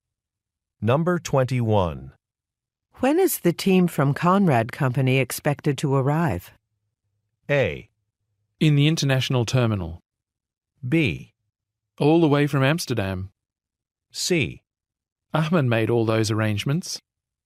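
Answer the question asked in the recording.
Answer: C: Ahmed made all those arrangements.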